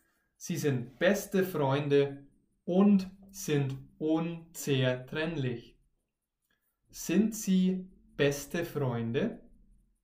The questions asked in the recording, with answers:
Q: Sind sie beste Freunde?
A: Ja, sie sind beste Freunde.